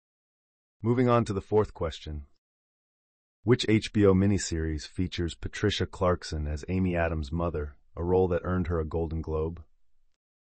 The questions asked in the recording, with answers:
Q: Which HBO miniseries features Patricia Clarkson as Amy Adams' mother, a role that earned her a Golden Globe?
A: The answer is Sharp Objects.